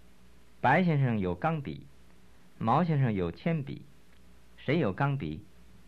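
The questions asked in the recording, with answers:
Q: 谁有钢笔?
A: 白先生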